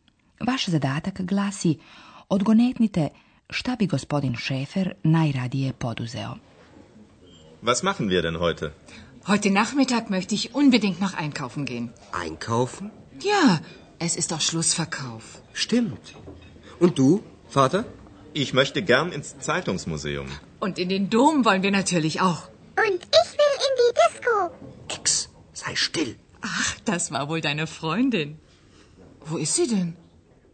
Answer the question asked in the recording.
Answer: Gospodin Schäfer u muzej novina